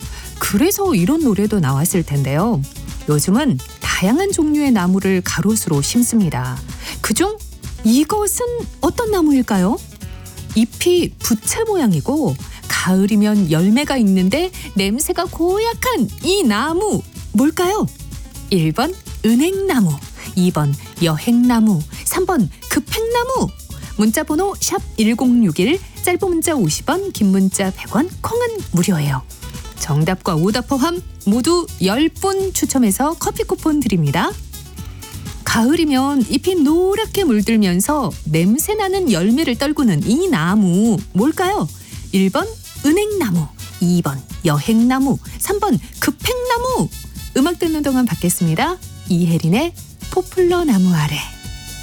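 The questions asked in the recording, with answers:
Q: 가을이면 잎이 노랗게 물들면서 냄새나는 열매를 떨구는 이 나무 뭘까요?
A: 1: 은행나무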